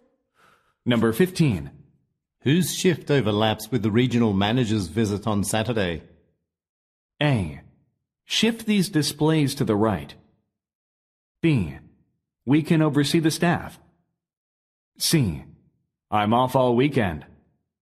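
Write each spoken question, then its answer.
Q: Whose shift overlaps with the regional manager's visit on Saturday?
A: C: I'm off all weekend.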